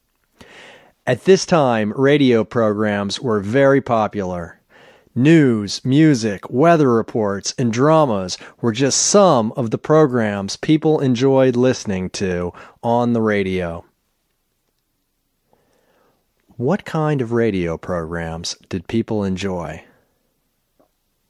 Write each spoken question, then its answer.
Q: What kind of radio programs did people enjoy?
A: They enjoyed news, music, weather reports, and dramas.